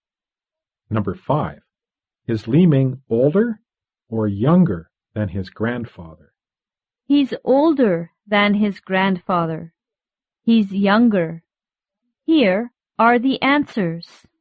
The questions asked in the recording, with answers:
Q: Is Li Ming older or younger than his grandfather?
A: Li Ming is younger than his grandfather.